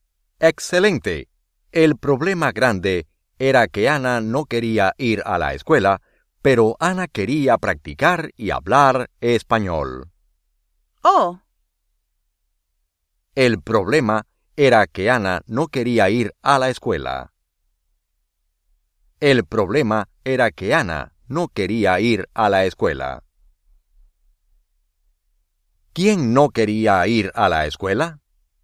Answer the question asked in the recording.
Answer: Ana.